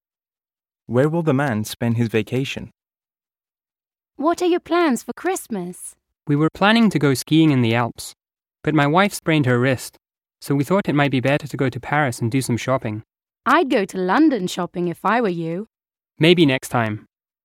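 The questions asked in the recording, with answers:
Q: Where will the man spend his vacation?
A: Paris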